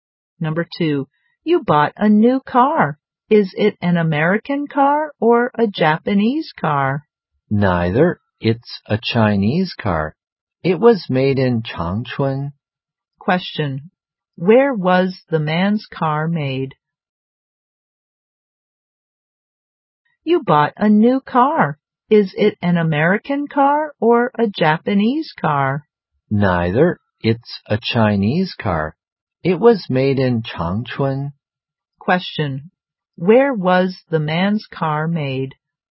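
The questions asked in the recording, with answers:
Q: Where was the man's car made?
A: In Changchun, China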